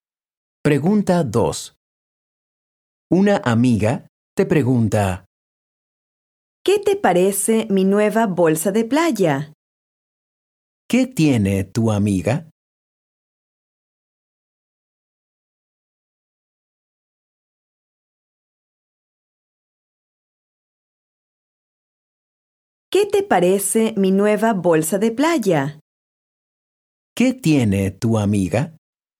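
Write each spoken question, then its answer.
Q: ¿Qué tiene tu amiga?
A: Una nueva bolsa de playa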